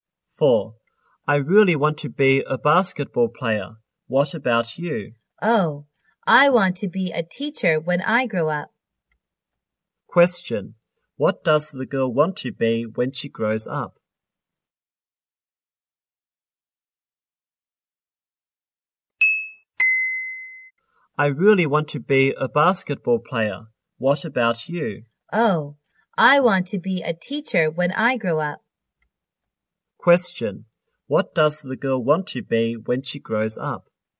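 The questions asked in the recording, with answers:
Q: What does the girl want to be when she grows up?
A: A teacher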